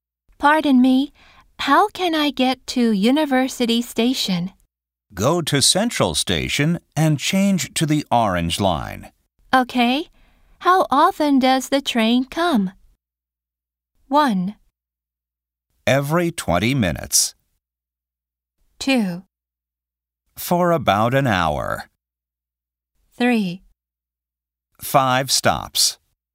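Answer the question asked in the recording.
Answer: 1: Every 20 minutes.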